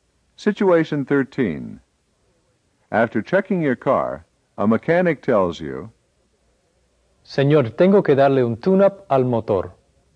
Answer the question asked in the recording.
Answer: He said, Sir, I have to tune up the engine.